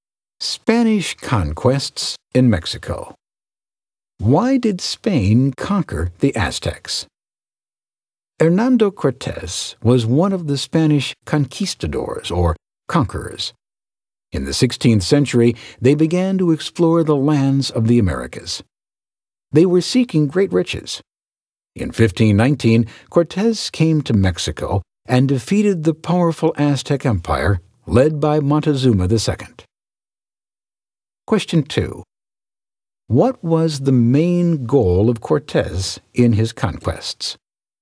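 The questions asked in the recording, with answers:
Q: What was the main goal of Cortés in his conquests?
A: To find great riches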